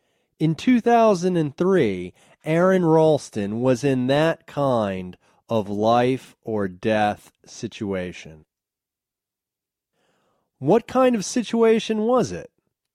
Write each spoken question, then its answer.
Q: What kind of situation was it?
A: It was a life or death situation.